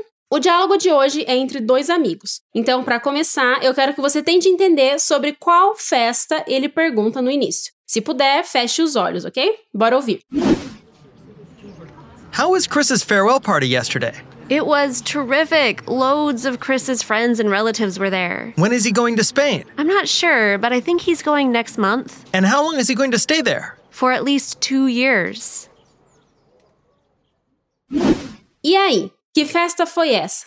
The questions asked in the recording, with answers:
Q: Então, para começar, eu quero que você tente entender sobre qual festa ele pergunta no início.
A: Então, farewell party significa festa de despedida.